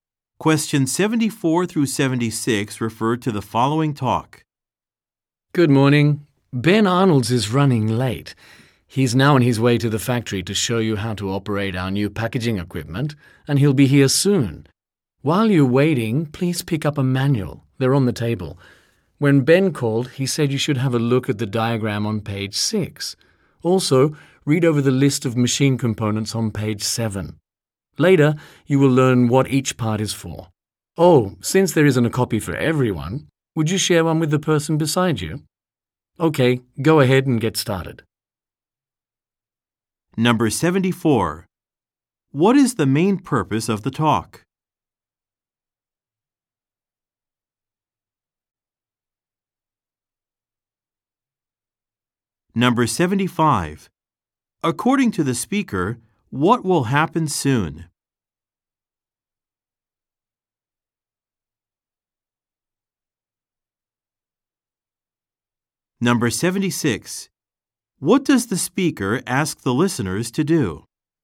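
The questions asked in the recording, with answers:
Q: According to the speaker, what will happen soon?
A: Ben Arnold will arrive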